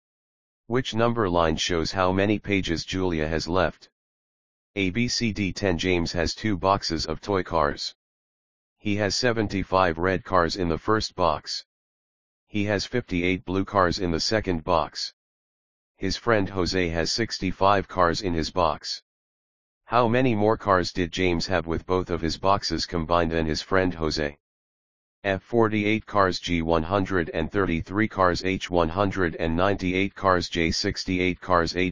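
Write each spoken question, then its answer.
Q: How many more cars did James have with both of his boxes combined than his friend Jose?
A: J: 68 cars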